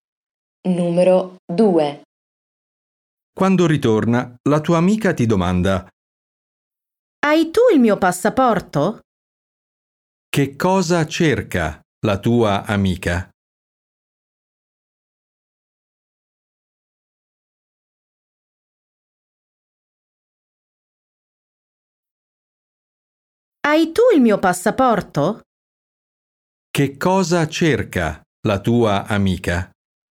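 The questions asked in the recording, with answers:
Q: Che cosa cerca la tua amica?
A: Il passaporto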